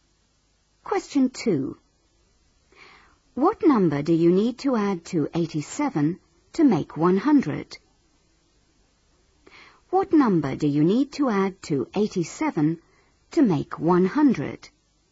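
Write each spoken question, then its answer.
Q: What number do you need to add to 87 to make 100?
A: 13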